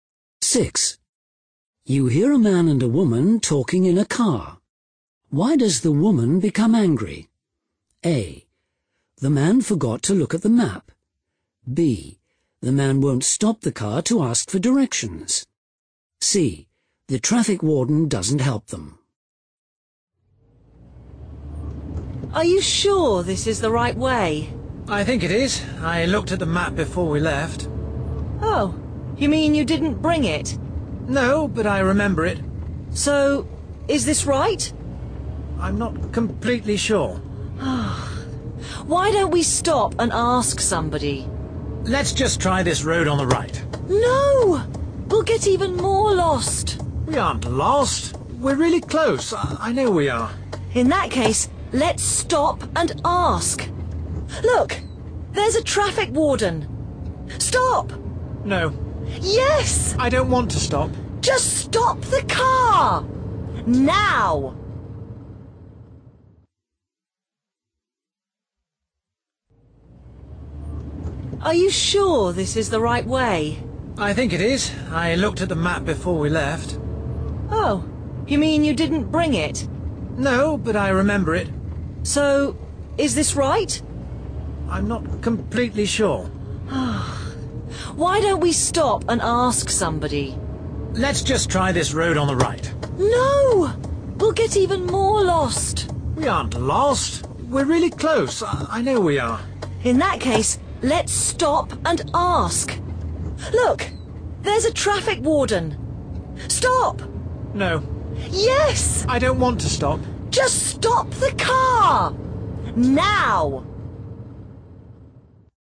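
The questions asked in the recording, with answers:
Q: Why does the woman become angry?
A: B: The man won't stop the car to ask for directions.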